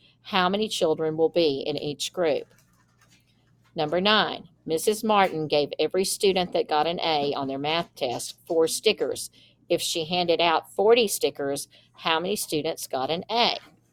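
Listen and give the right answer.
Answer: 10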